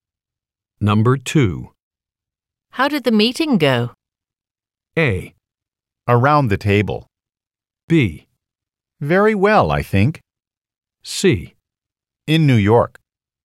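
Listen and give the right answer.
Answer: B: Very well, I think.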